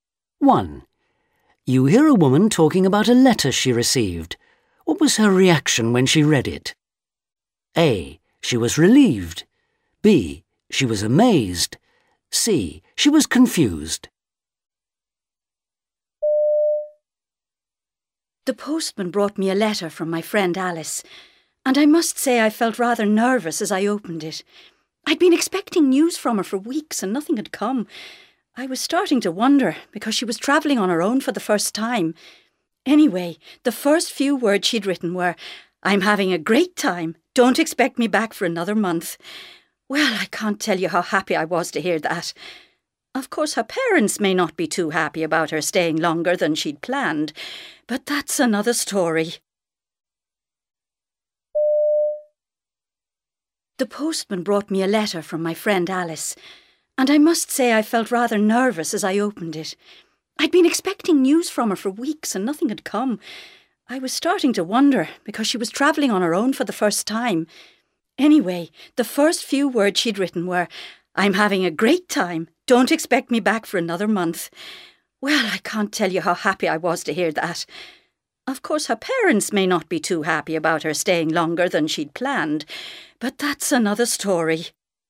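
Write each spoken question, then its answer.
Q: What was her reaction when she read it?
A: A: She was relieved.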